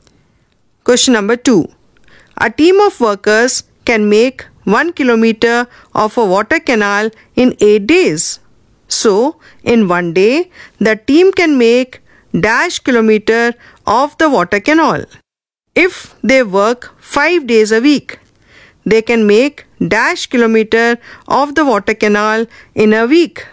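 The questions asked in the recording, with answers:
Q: So, in one day, the team can make dash kilometer of the water canal.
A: 1/8 kilometer

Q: If they work 5 days a week, they can make dash kilometer of the water canal in a week.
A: 5/8 kilometer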